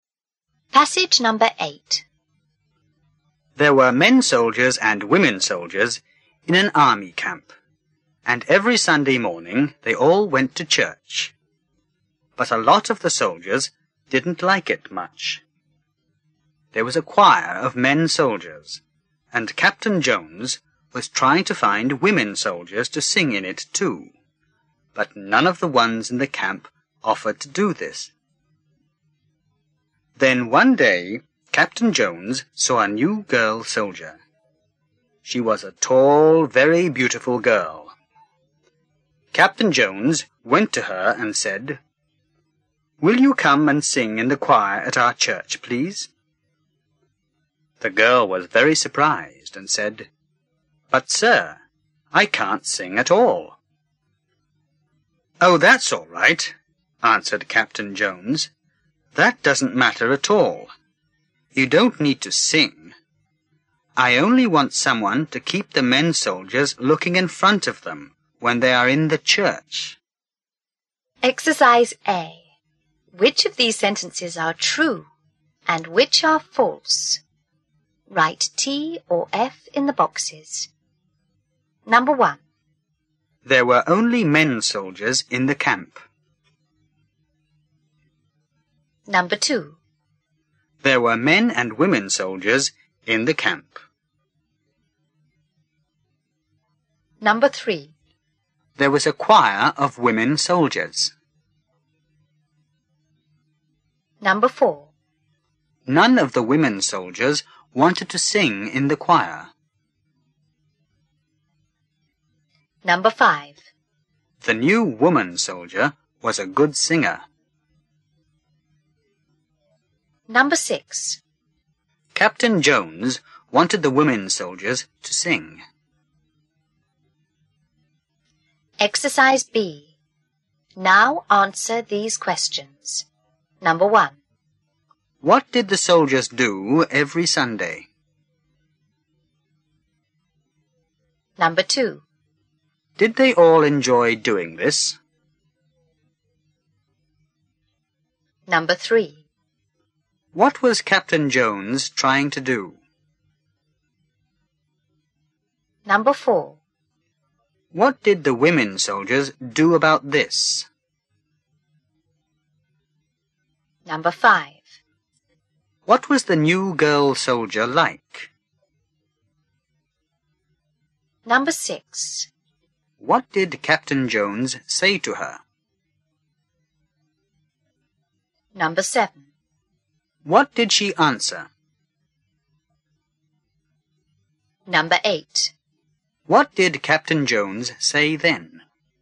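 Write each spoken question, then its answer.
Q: There were only men soldiers in the camp.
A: False

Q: There were men and women soldiers in the camp.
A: True

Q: There was a choir of women soldiers.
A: False

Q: None of the women soldiers wanted to sing in the choir.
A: True

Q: The new woman soldier was a good singer.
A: False

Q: What did the soldiers do every Sunday?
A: They went to church.

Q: Did they all enjoy doing this?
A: No, a lot of them didn't like it much.

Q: What was Captain Jones trying to do?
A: Find women soldiers to sing in the choir.

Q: What did the women soldiers do about this?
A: None of them offered to sing.

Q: What was the new girl soldier like?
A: Tall and very beautiful.

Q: What did Captain Jones say to her?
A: Will you come and sing in the choir at our church, please?

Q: What did she answer?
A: But, sir, I can't sing at all.

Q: What did Captain Jones say then?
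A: That doesn't matter; she only needed to keep the men looking in front of them.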